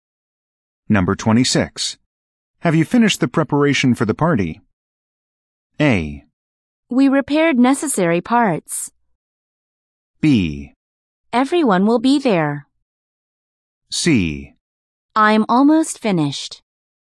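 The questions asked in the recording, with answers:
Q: Have you finished the preparation for the party?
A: C: I'm almost finished.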